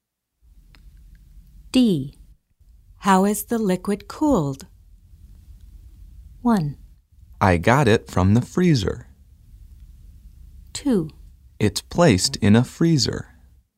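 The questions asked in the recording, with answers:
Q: How is the liquid cooled?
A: 2: It's placed in a freezer.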